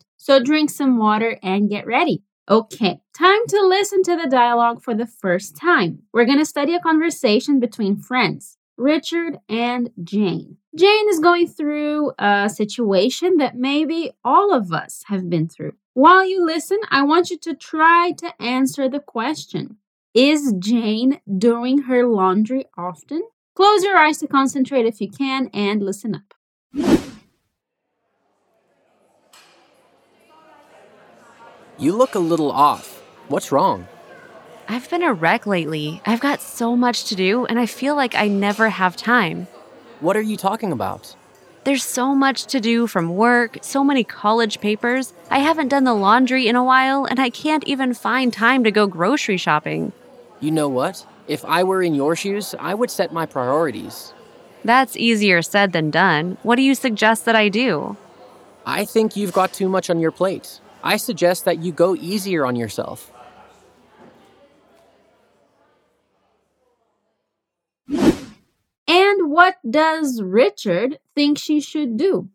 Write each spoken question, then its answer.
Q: what does Richard think she should do?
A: So basically, Richard thinks Jane needs to let go of some things.